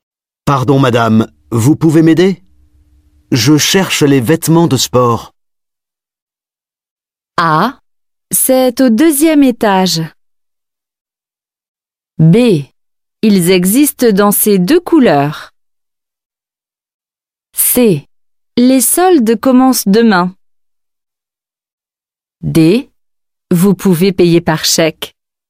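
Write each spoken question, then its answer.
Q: Pardon, madame, vous pouvez m'aider ? Je cherche les vêtements de sport.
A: A: C'est au deuxième étage.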